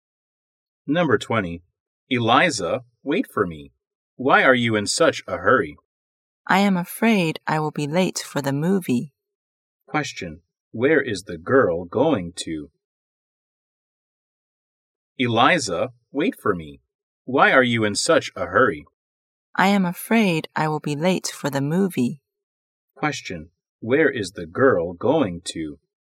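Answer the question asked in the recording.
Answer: The cinema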